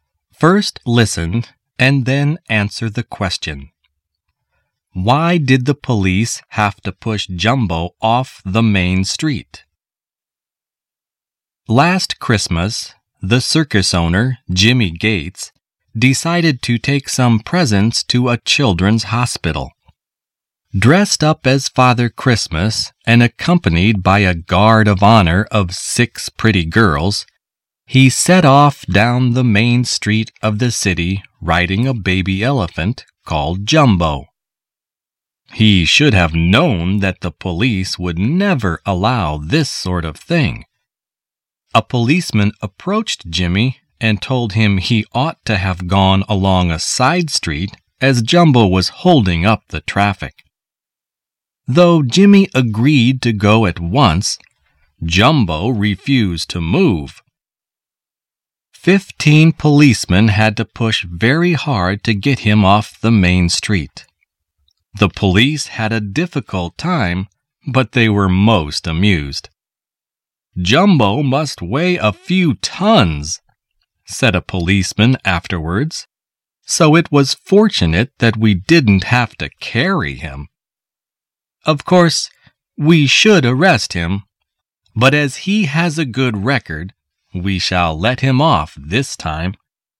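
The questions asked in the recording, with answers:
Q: Why did the police have to push Jumbo off the main street?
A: Because Jumbo was holding up the traffic and refused to move.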